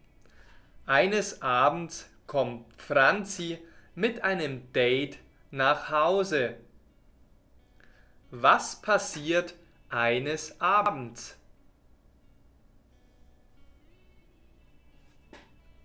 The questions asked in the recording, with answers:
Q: Was passiert eines Abends?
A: Franzi kommt mit einem Date nach Hause.